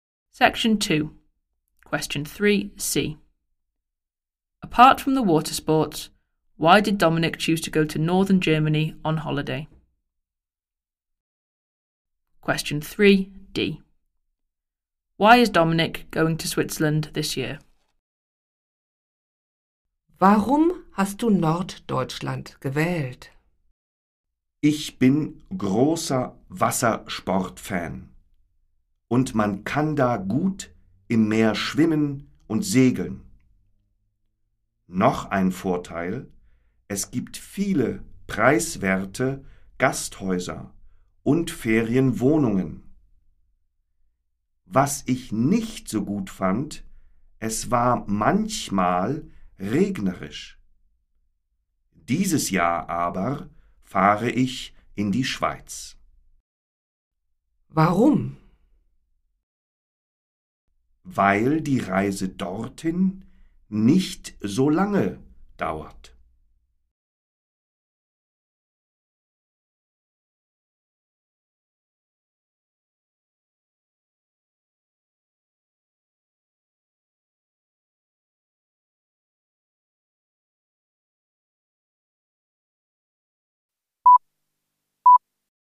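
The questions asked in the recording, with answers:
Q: Apart from the water sports, why did Dominic choose to go to northern Germany on holiday?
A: There are many cheap guesthouses and holiday flats

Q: Why is Dominic going to Switzerland this year?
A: Because the journey there doesn't take so long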